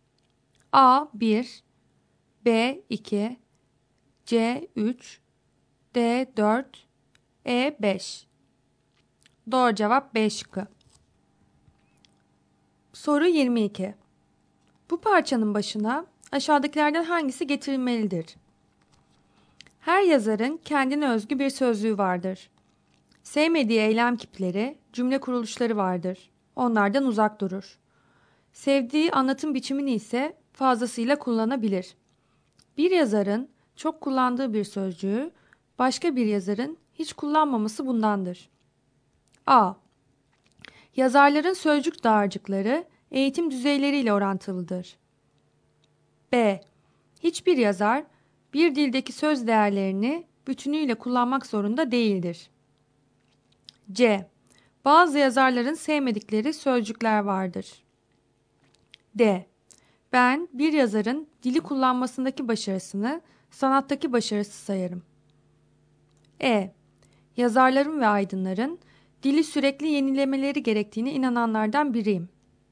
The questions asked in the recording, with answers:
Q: Bu parçanın başına aşağıdakilerden hangisi getirilmelidir?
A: Doğru cevap B şıkkı.